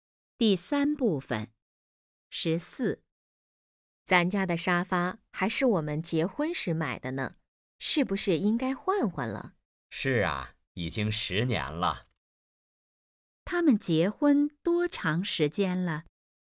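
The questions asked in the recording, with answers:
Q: 他们结婚多长时间了?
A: 10年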